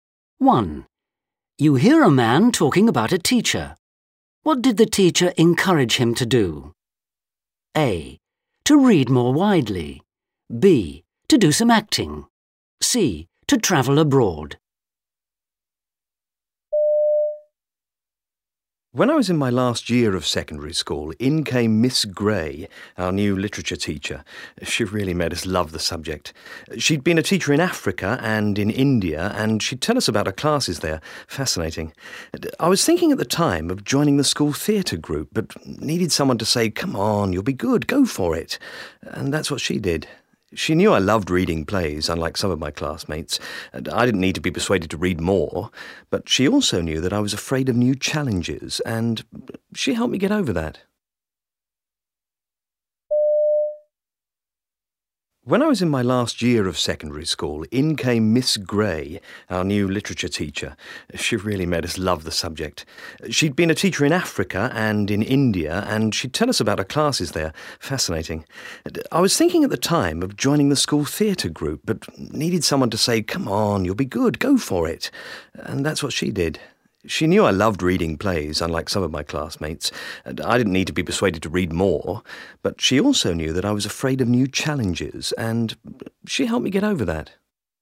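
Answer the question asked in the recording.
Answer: B: To do some acting.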